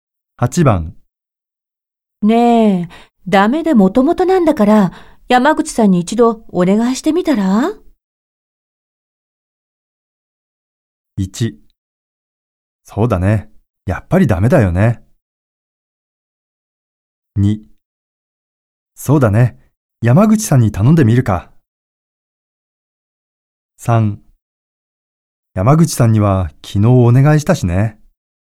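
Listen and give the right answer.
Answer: 2: そうだね。山口さんに頼んでみるか。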